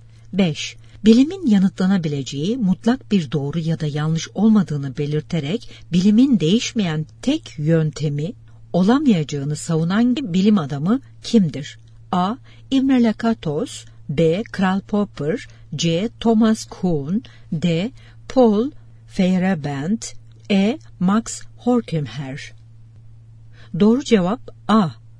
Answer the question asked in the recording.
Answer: Doğru cevap A.